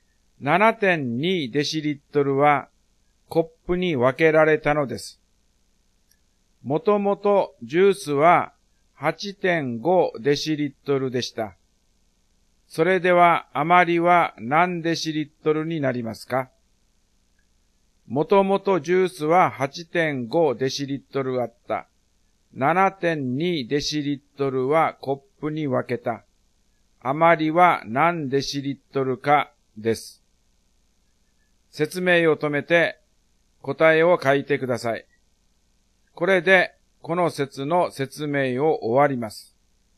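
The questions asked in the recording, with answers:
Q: それでは余りは何デシリットルになりますか?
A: 1.3デシリットル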